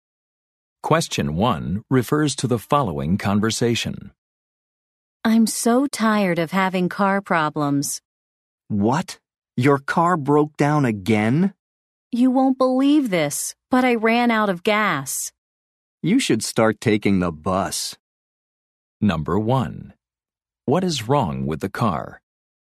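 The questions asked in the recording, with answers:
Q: What is wrong with the car?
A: It ran out of gas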